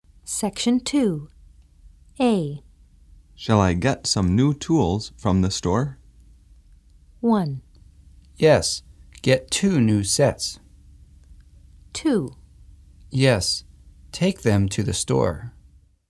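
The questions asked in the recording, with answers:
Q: Shall I get some new tools from the store?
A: 1: Yes, get 2 new sets.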